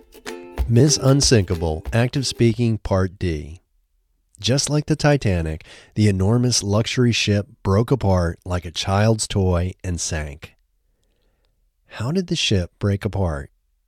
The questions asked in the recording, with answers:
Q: How did the ship break apart?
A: The ship broke apart like a child's toy.